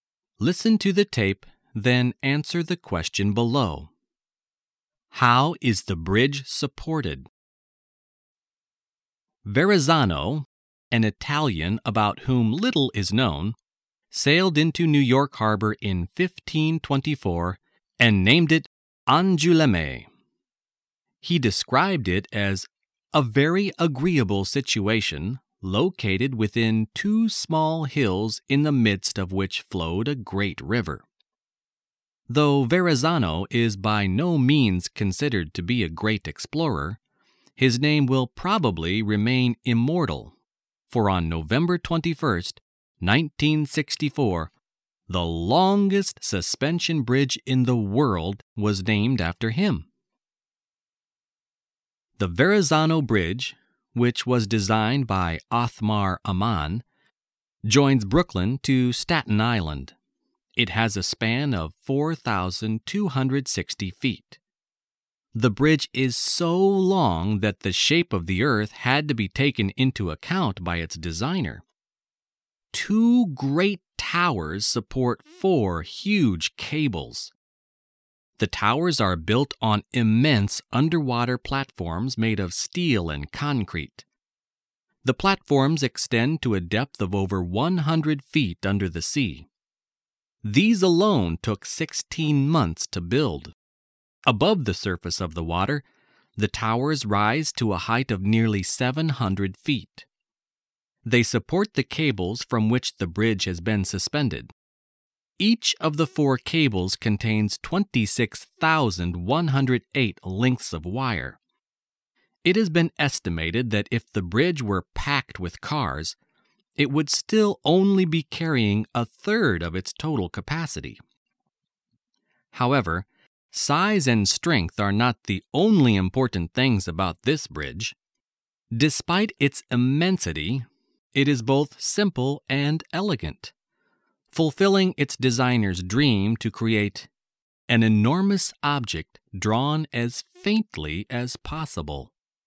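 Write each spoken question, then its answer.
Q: How is the bridge supported?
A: By two great towers that support four huge cables; the towers stand on huge steel and concrete platforms under the water.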